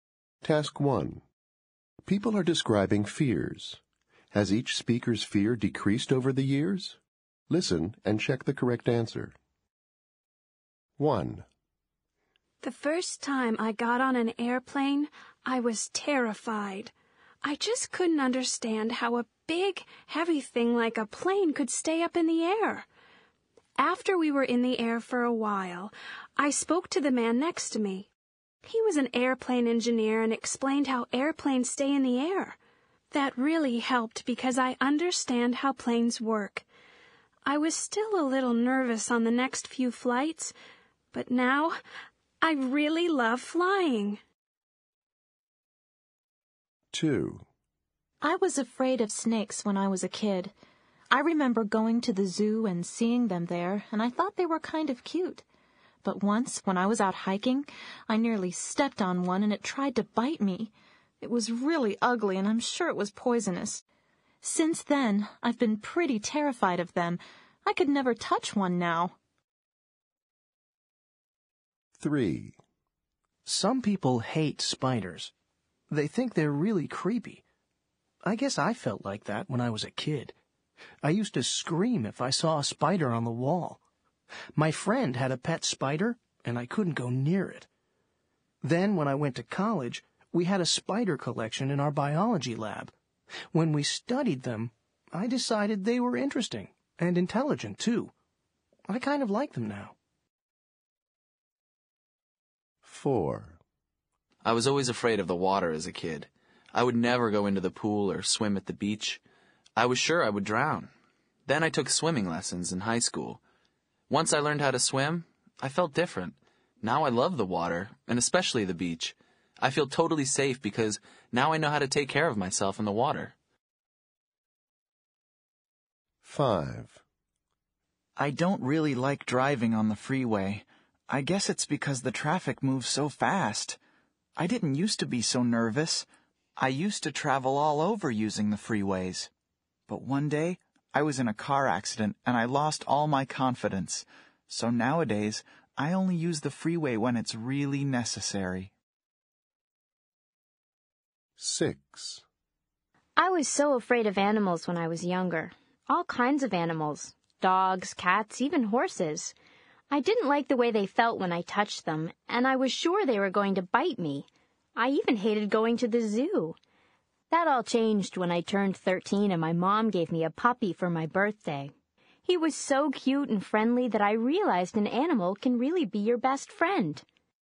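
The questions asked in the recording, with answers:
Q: Has each speaker's fear decreased over the years?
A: Yes

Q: Has each speaker's fear decreased over the years?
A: No

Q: Has each speaker's fear decreased over the years?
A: Yes

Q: Has each speaker's fear decreased over the years?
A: Yes

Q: Has each speaker's fear decreased over the years?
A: No

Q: Has each speaker's fear decreased over the years?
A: Yes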